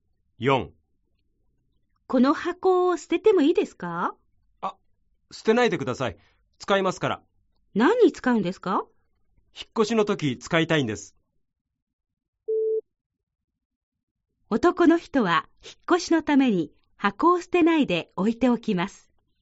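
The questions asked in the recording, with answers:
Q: 男の人は引っ越しのために箱を捨てないで置いておきます。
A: ○(正しい)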